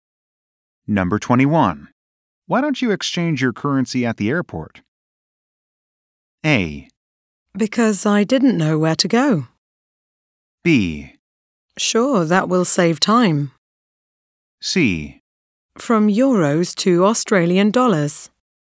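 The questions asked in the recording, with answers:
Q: Why don't you exchange your currency at the airport?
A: B: Sure, that will save time.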